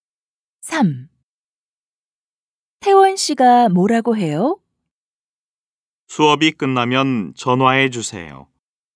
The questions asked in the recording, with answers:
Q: 태원 씨가 뭐라고 해요?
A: 태원 씨가 수업이 끝나면 전화해 달라고 해요.